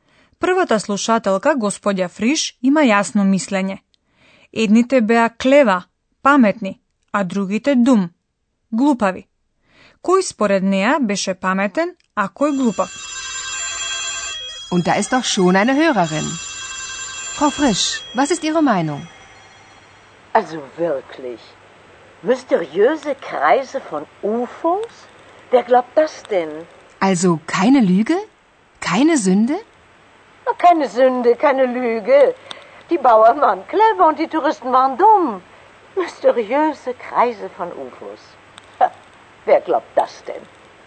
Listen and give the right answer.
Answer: Господја Фриш смета дека селаните, die Bauern, беа clever, pametni, a туристите dumm, glupavi.